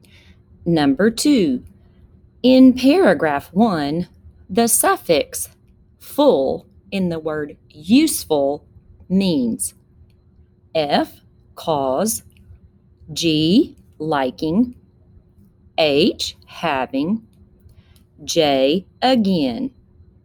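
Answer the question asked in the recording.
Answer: H: having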